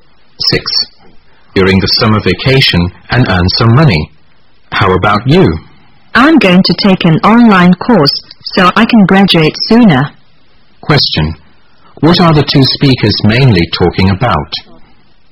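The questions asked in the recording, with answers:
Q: What are the two speakers mainly talking about?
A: Their plans for the summer vacation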